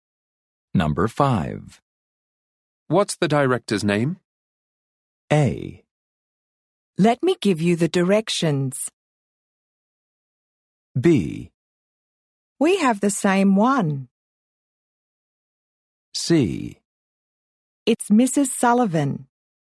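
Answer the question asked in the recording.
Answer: C: It's Mrs. Sullivan.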